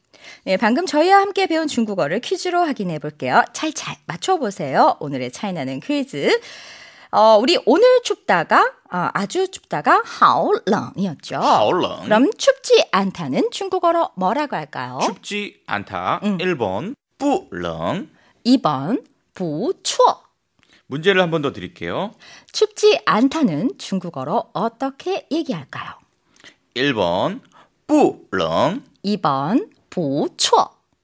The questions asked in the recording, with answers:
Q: 춥지 않다는 중국어로 어떻게 얘기할까요?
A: 정답은 1번. 뿌렁.